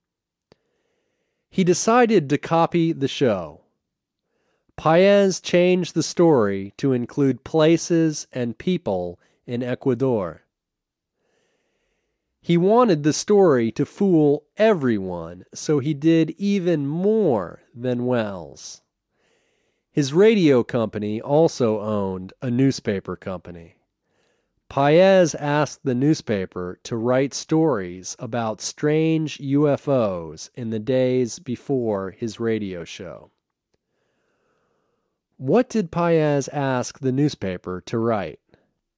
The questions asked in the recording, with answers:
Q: What did Paez ask the newspaper to write?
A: Paez asked the newspaper to write stories about strange UFOs.